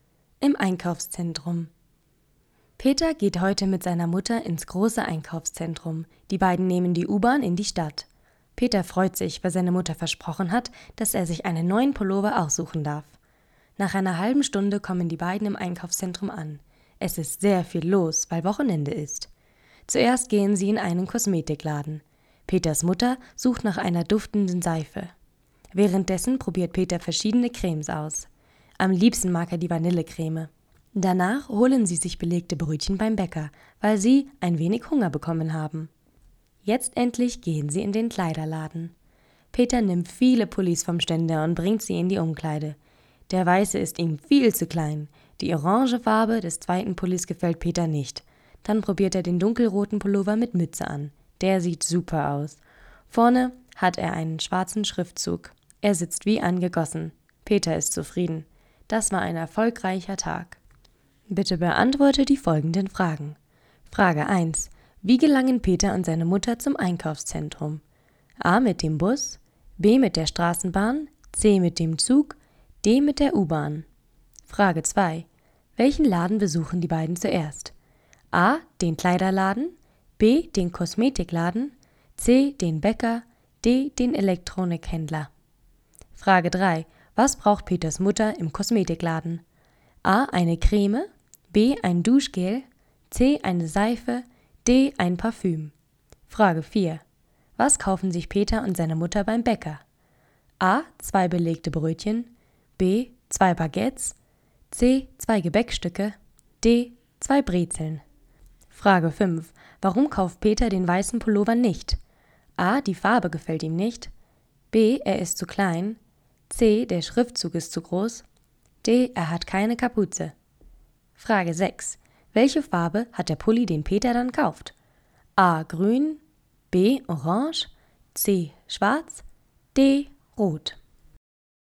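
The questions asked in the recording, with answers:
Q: Wie gelangen Peter und seine Mutter zum Einkaufszentrum?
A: D: Mit der U-Bahn

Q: Welchen Laden besuchen die beiden zuerst?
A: B: Den Kosmetikladen

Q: Was braucht Peters Mutter im Kosmetikladen?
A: C: Eine Seife

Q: Was kaufen sich Peter und seine Mutter beim Bäcker?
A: A: Zwei belegte Brötchen

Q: Warum kauft Peter den weißen Pullover nicht?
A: B: Er ist zu klein

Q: Welche Farbe hat der Pulli, den Peter dann kauft?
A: D: Rot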